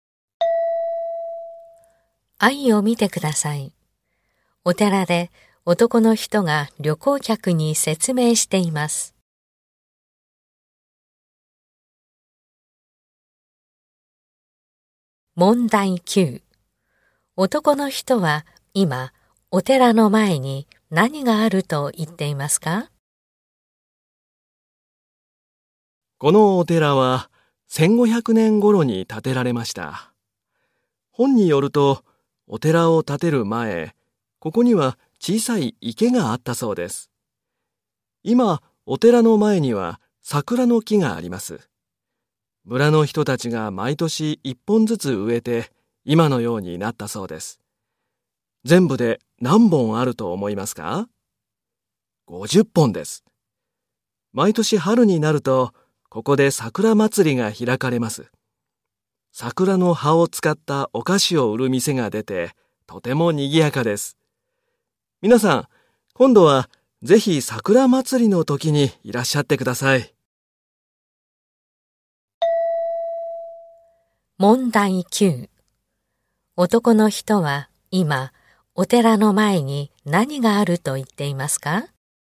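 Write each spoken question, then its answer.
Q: 男の人は今お寺の前に何があると言っていますか?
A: 桜の木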